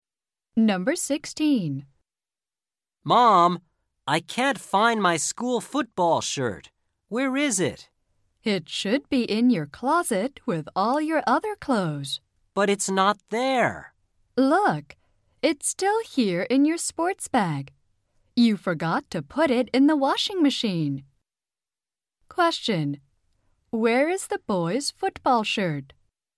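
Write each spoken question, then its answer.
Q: where is the boy's football shirt?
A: In his sports bag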